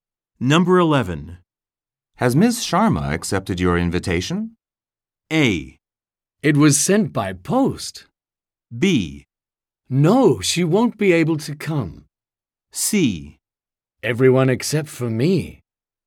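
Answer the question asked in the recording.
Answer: B: No, she won't be able to come.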